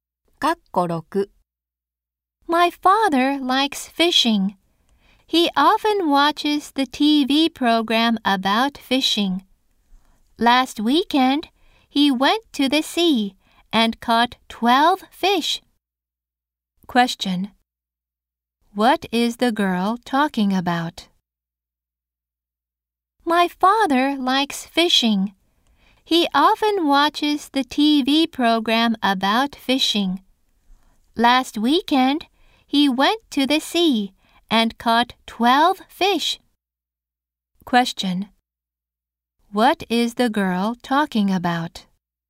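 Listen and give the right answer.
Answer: Her father's hobby, fishing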